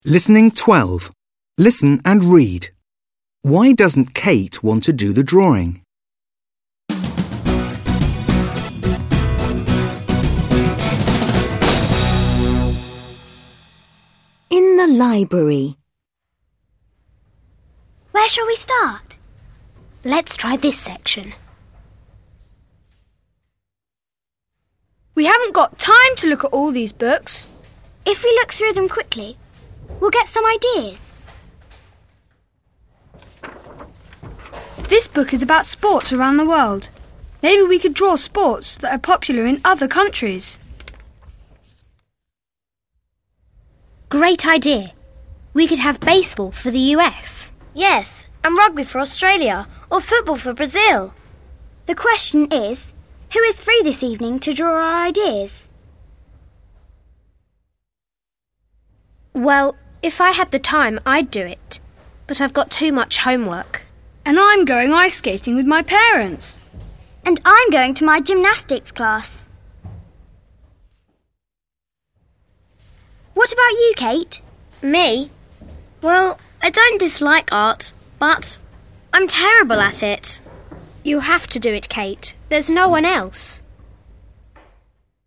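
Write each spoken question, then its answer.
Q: Why doesn't Kate want to do the drawing?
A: Because she is terrible at art.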